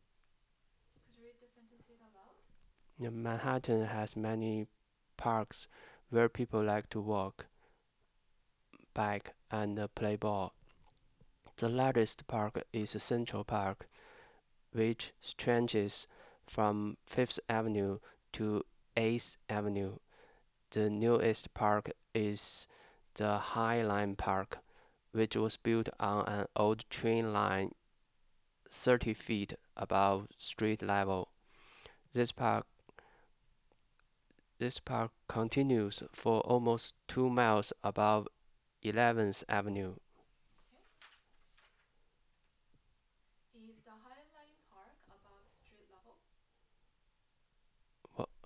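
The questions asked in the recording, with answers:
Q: Is the High Line Park above street level?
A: Yes, 30 feet above street level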